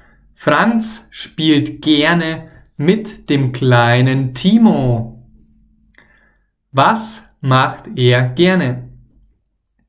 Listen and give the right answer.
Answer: Er spielt gerne mit dem kleinen Timo.